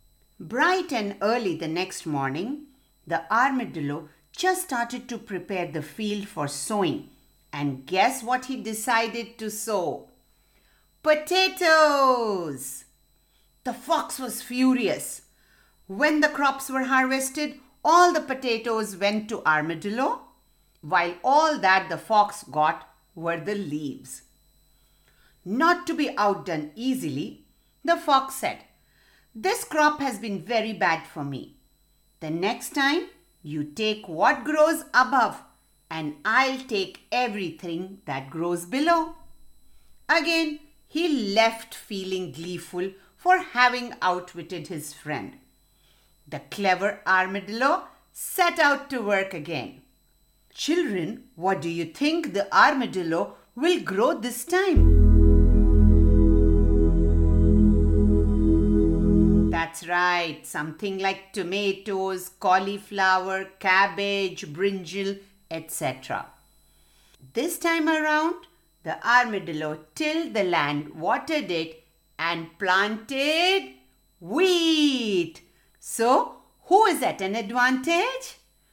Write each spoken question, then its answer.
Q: So, who is at an advantage?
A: Armadillo, because the fox wanted all that grows under the ground.